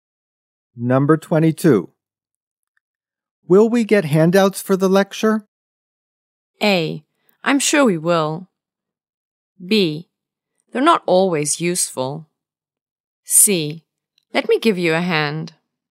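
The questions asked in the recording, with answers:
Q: Will we get handouts for the lecture?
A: A: I'm sure we will.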